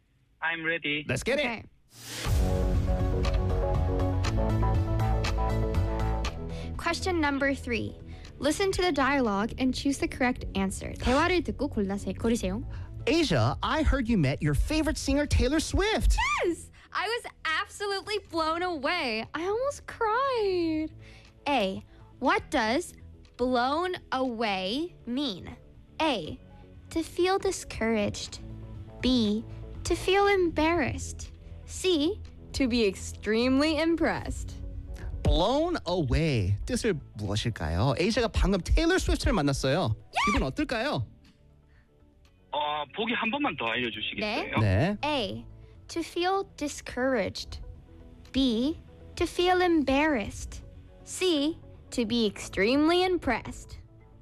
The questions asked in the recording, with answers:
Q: What does blown away mean?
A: C입니다. 예.